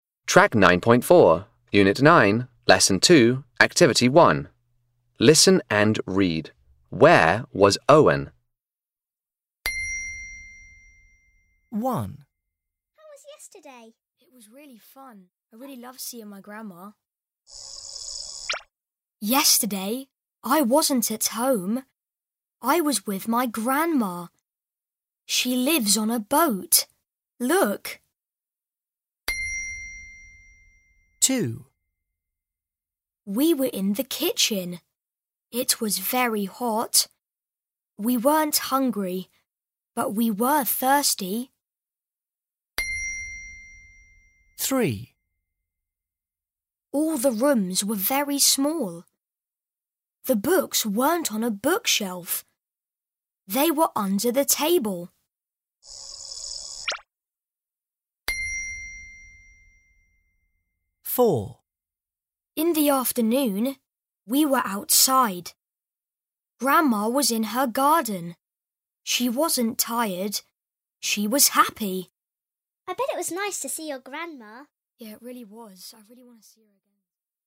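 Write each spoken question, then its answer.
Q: Where was Owen?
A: With his grandma, on her boat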